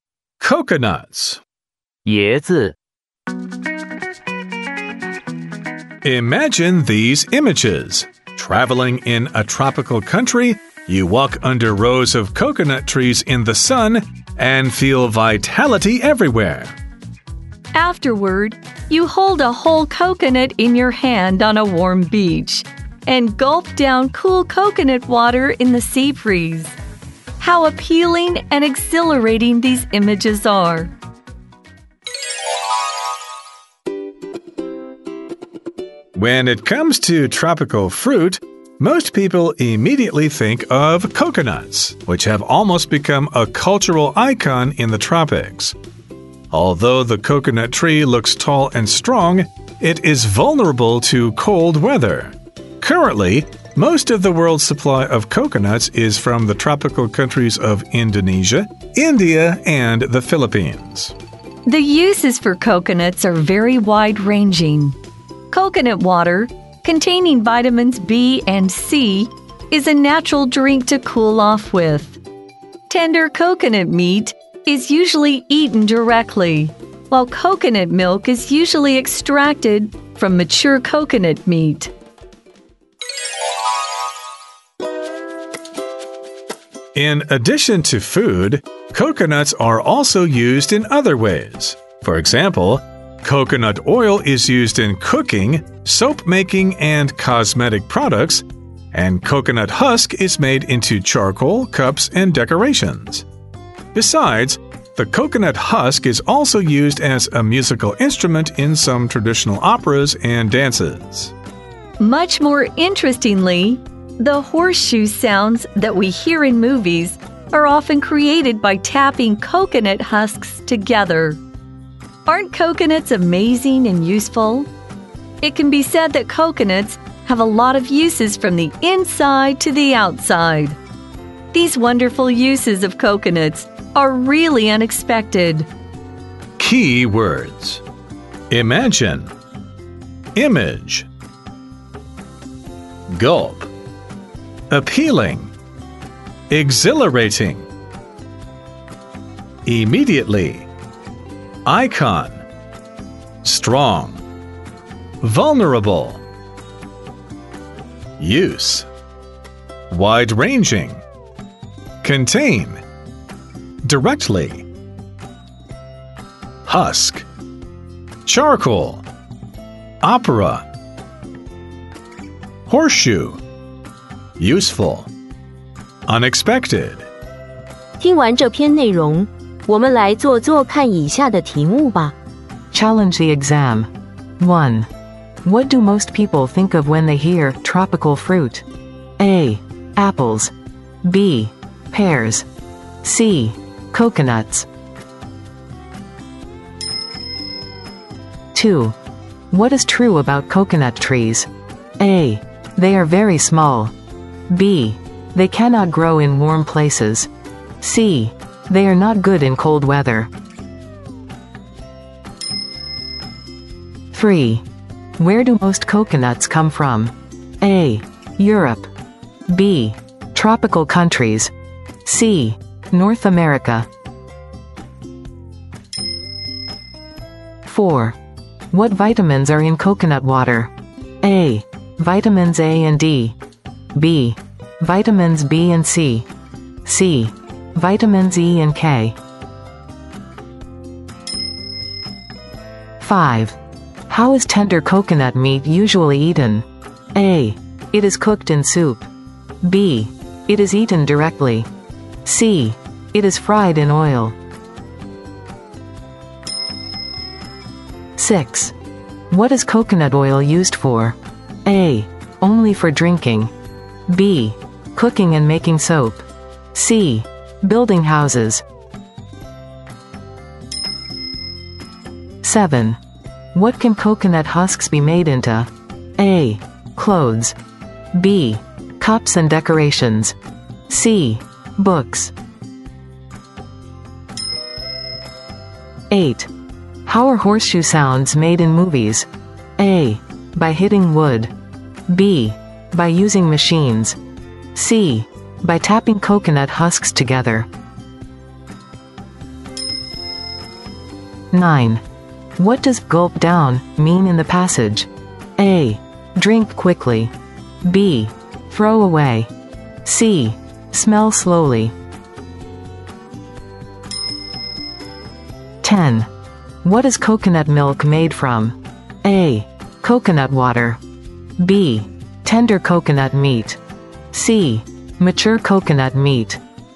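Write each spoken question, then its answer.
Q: What do most people think of when they hear tropical fruit?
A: C: Coconuts.

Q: What is true about coconut trees?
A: C: They are not good in cold weather.

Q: Where do most coconuts come from?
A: B: Tropical countries.

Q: What vitamins are in coconut water?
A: B: Vitamins B and C.

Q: How is tender coconut meat usually eaten?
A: B: It is eaten directly.

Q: What is coconut oil used for?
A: B: Cooking and making soap.

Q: What can coconut husks be made into?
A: B: Cups and decorations.

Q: How are horseshoe sounds made in movies?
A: C: By tapping coconut husks together.

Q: What does gulp down mean in the passage?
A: A: Drink quickly.

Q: What is coconut milk made from?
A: C: Mature coconut meat.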